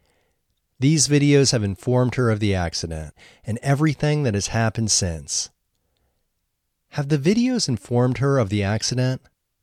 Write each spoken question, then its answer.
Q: Have the videos informed her of the accident?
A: Yes, the videos have informed her of the accident.